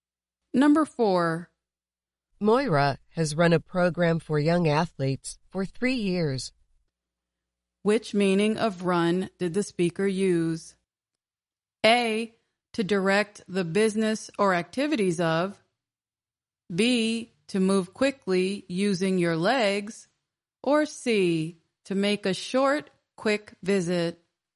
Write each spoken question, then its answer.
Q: Which meaning of run did the speaker use?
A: The answer is A, to direct the business or activities of.